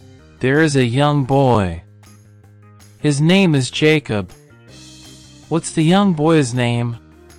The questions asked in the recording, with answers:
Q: What's the young boy's name?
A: Jacob. His name is Jacob.